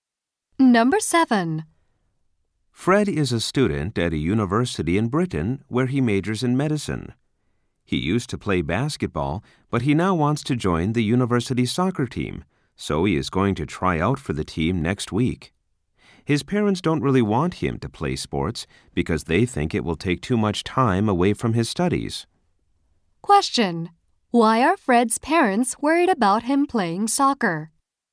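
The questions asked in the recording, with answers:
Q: Why are Fred's parents worried about him playing soccer?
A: They think it will take too much time away from his studies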